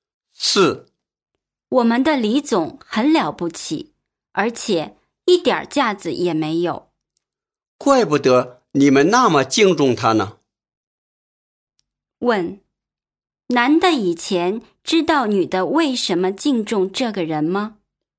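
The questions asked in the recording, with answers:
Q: 问,男的以前知道女的为什么敬重这个人吗?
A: 不知道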